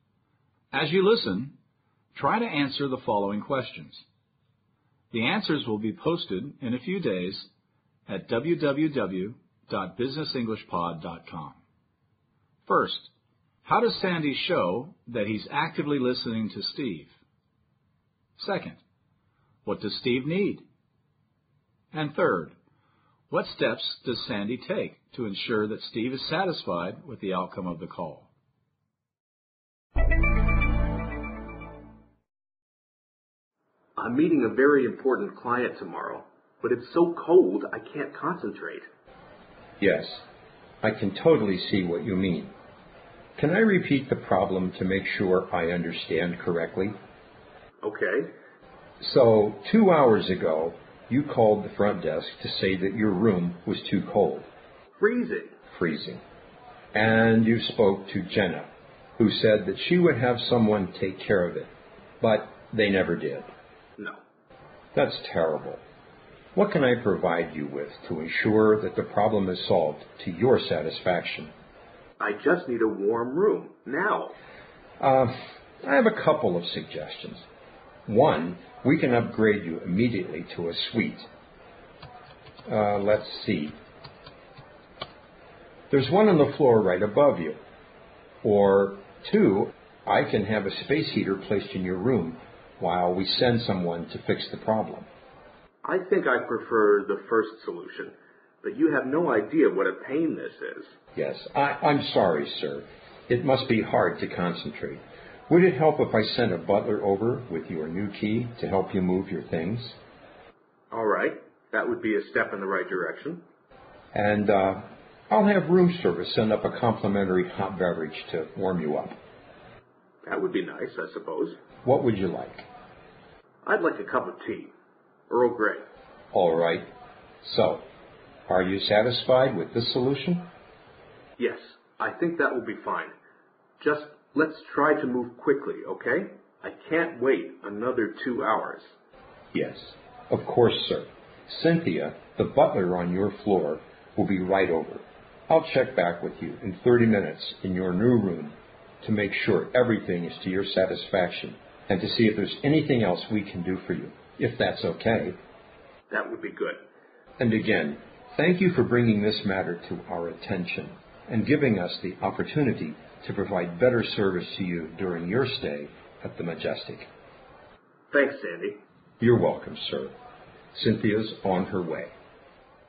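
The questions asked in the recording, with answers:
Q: how does Sandy show that he's actively listening to Steve?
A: He asks, "Can I repeat the problem to make sure I've understood correctly?" This is clarifying the problem.

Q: what does Steve need?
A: A warm room, right away.

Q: what steps does Sandy take to ensure that Steve is satisfied with the outcome of the call?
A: He asks Steve if he is satisfied with the solution and says he will check back in 30 minutes.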